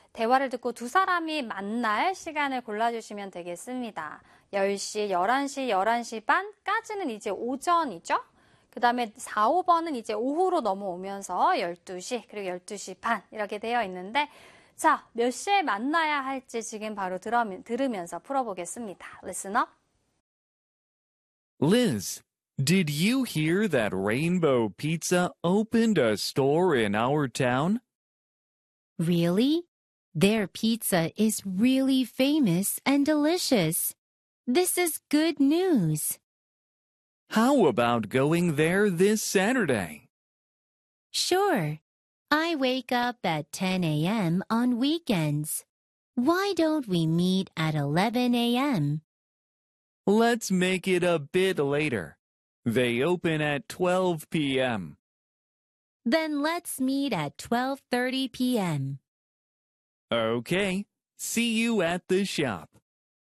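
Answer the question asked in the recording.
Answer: 5: 12시 반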